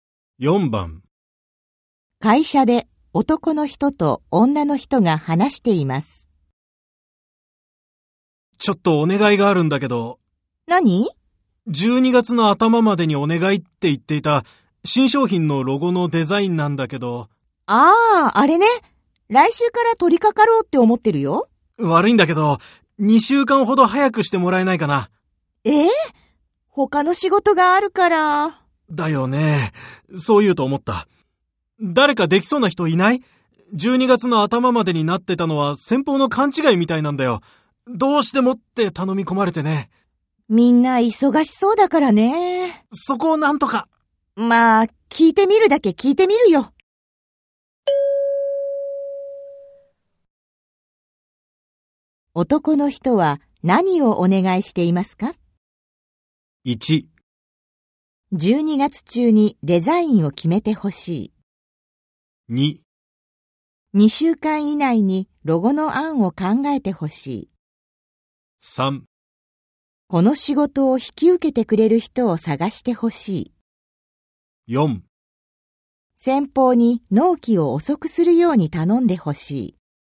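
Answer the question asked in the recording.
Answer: 3: この仕事を引き受けてくれる人を探してほしい。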